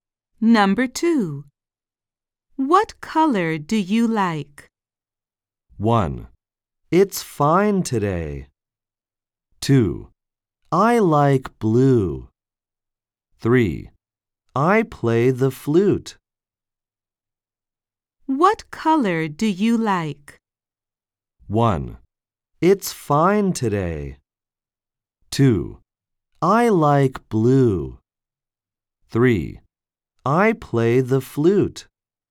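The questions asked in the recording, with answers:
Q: What color do you like?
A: 2: I like blue.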